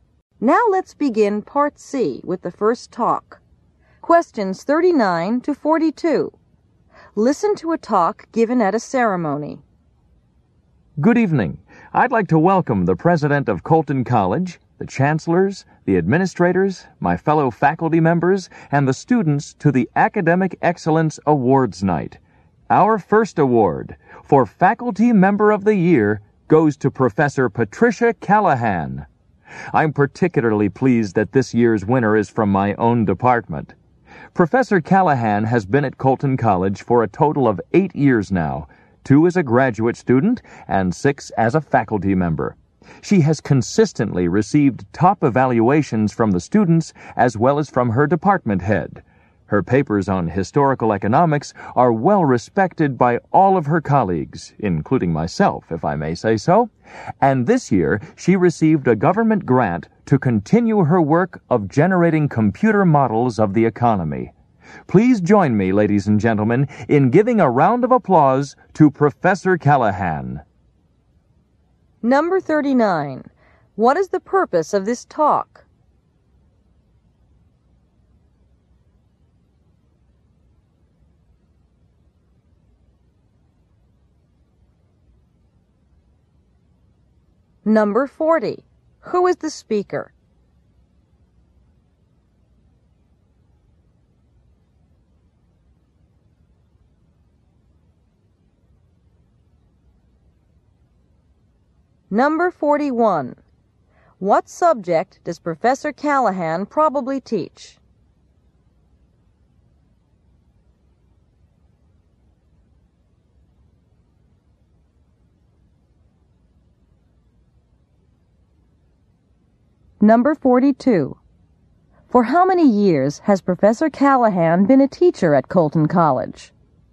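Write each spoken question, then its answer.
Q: What is the purpose of this talk?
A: To present the Faculty Member of the Year award

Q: Who is the speaker?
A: A professor in Professor Callahan's department

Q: What subject does Professor Callahan probably teach?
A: Economics

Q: For how many years has Professor Callahan been a teacher at Colton College?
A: 6 years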